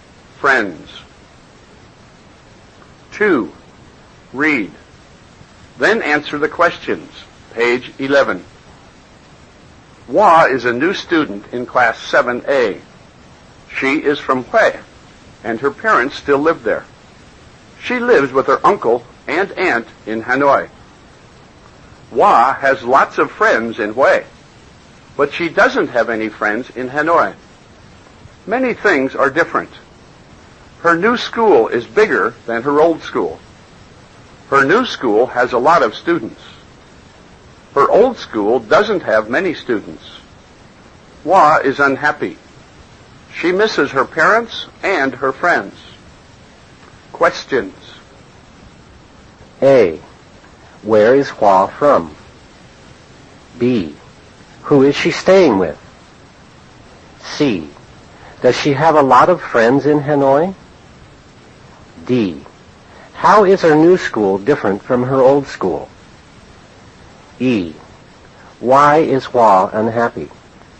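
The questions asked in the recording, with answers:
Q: Where is Hua from?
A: She is from Hue.

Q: Who is she staying with?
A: Her uncle and aunt.

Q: Does she have a lot of friends in Hanoi?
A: No, she doesn't have any friends in Hanoi.

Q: How is her new school different from her old school?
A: It is bigger and has a lot of students.

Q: Why is Hua unhappy?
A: She misses her parents and her friends.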